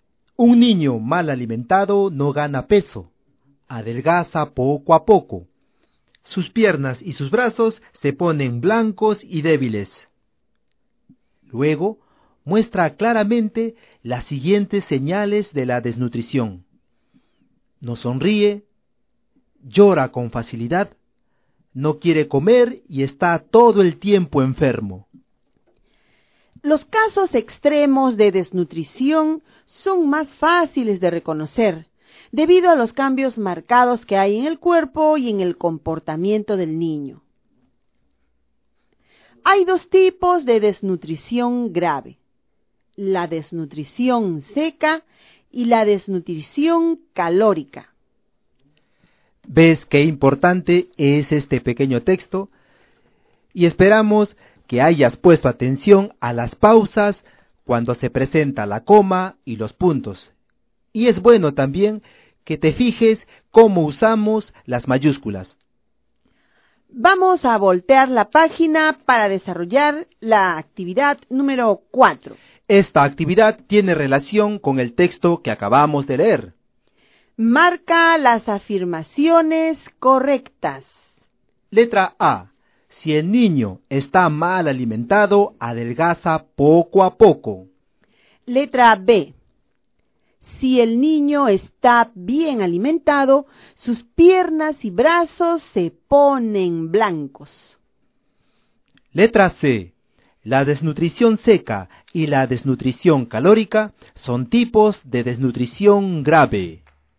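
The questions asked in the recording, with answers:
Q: Marca las afirmaciones correctas.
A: A: Si el niño está mal alimentado, adelgaza poco a poco; C: La desnutrición seca y la desnutrición calórica son tipos de desnutrición grave.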